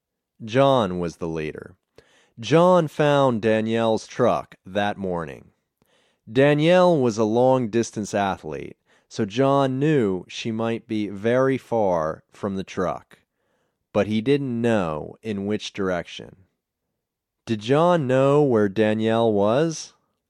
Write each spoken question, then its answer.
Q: Did John know where Danielle was?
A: No, he didn't know where she was.